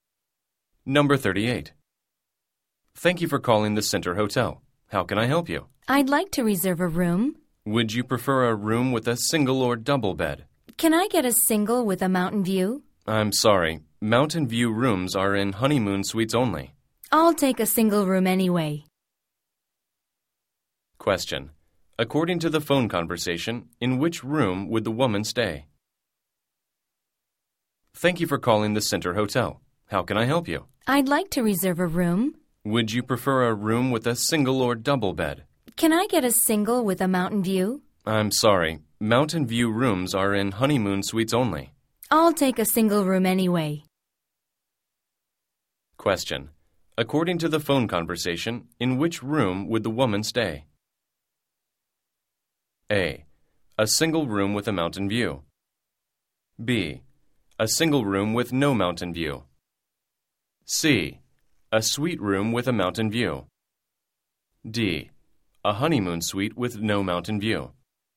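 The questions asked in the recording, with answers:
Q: According to the phone conversation, in which room would the woman stay?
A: B: A single room with no mountain view.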